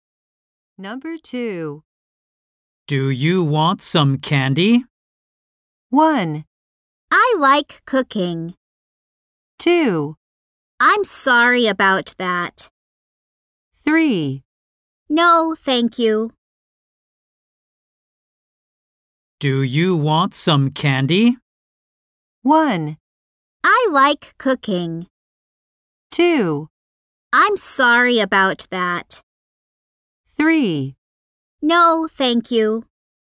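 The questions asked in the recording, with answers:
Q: Do you want some candy?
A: 3: No, thank you.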